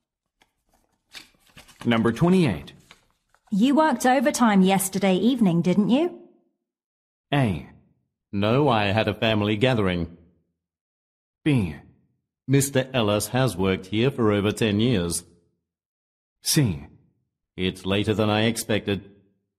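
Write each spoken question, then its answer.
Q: You worked overtime yesterday evening, didn't you?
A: A: No, I had a family gathering.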